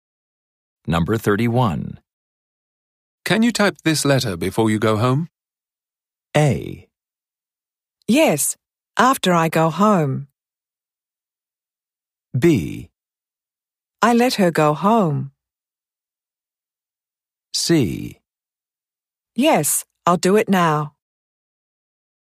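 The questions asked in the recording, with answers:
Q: Can you type this letter before you go home?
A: C: Yes, I'll do it now.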